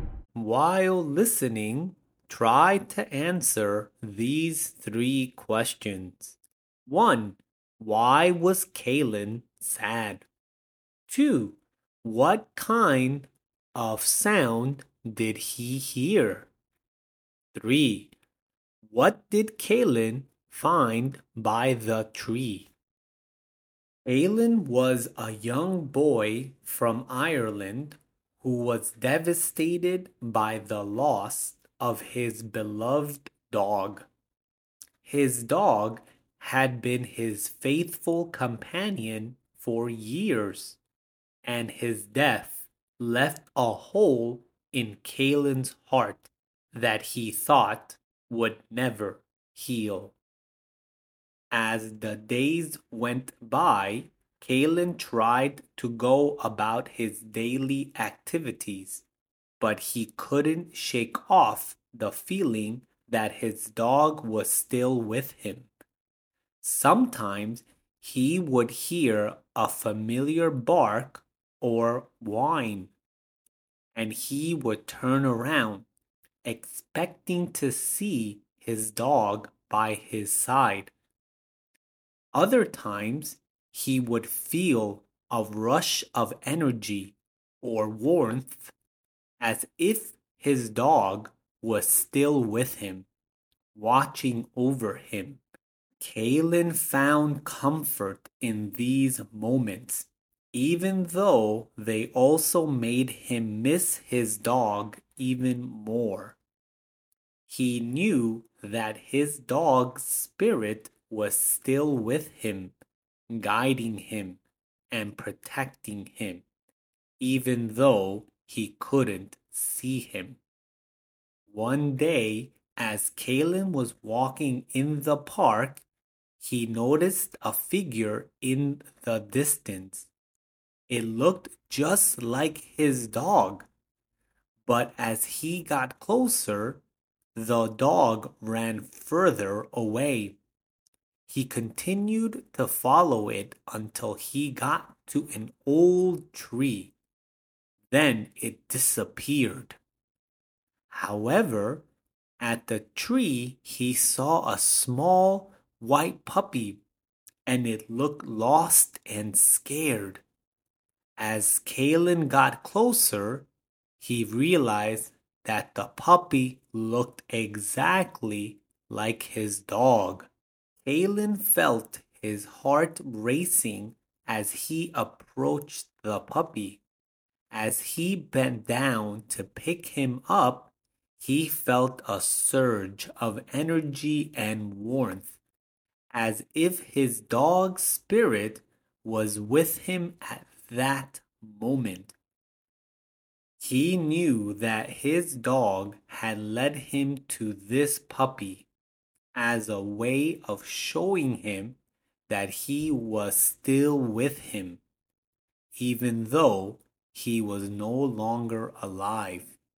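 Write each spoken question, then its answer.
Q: Why was Keilan sad?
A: His beloved dog had died.

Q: What kind of sound did he hear?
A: A familiar bark or whine

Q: What did Keilan find by the tree?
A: A small white puppy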